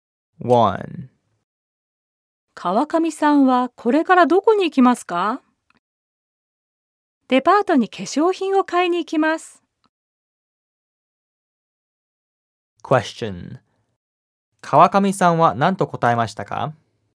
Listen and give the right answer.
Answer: 川上さんはデパートに化粧品を買いに行くと答えました。